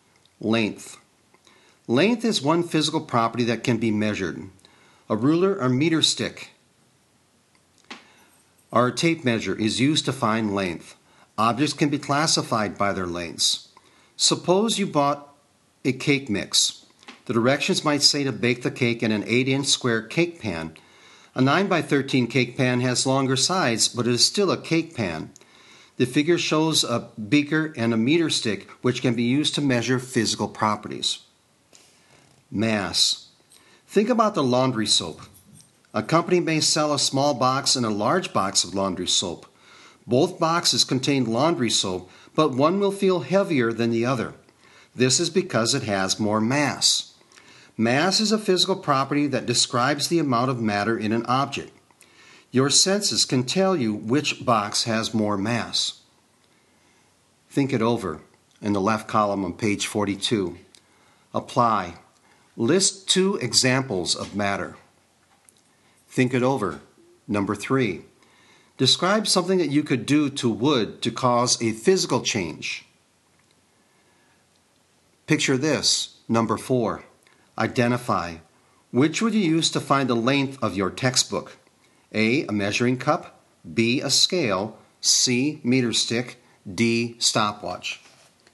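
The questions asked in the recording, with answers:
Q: Identify. Which would you use to find the length of your textbook?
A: C: Meter stick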